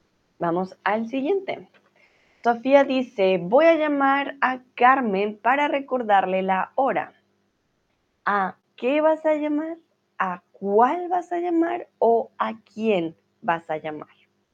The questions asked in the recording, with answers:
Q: ¿A qué vas a llamar? ¿A cuál vas a llamar?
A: Entonces, exactamente, ¿quién?